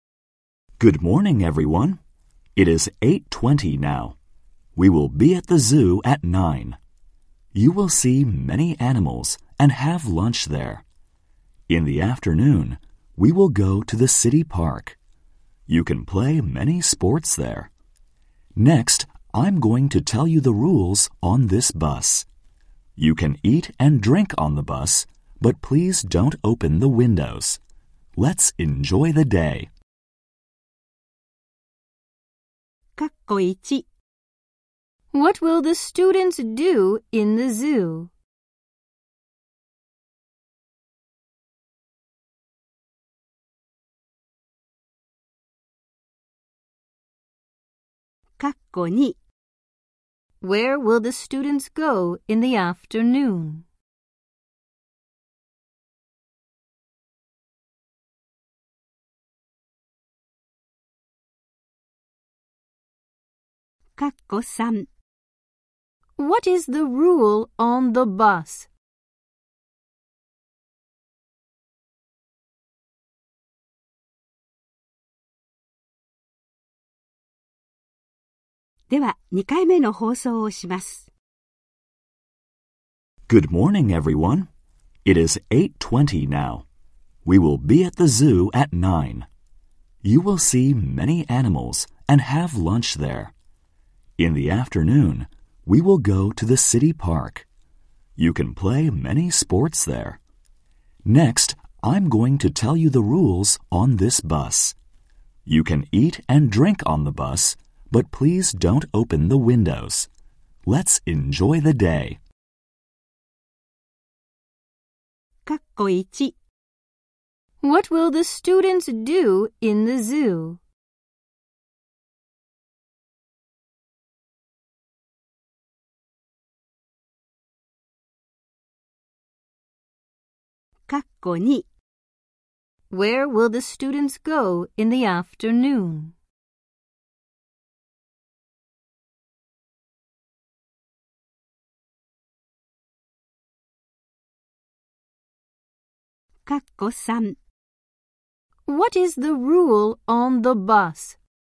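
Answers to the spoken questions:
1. See many animals and have lunch
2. The city park
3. Don't open the windows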